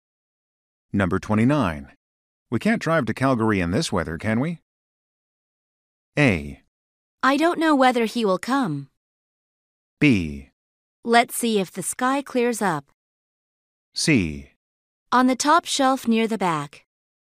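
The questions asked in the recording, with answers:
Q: We can't drive to Calgary in this weather, can we?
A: B: Let's see if the sky clears up.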